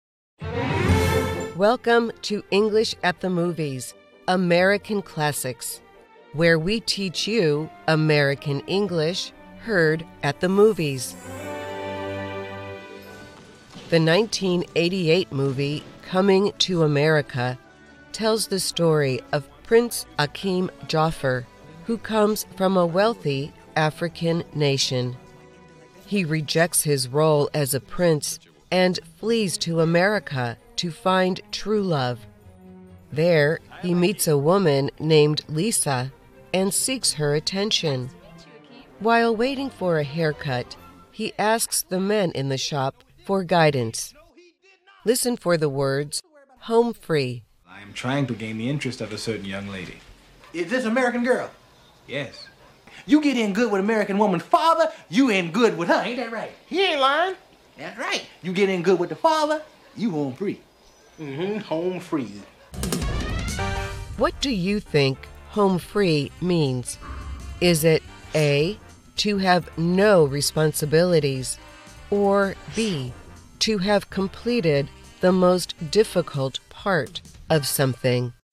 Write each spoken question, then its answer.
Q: What do you think home free means?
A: The answer is B, to have completed the most difficult part of something.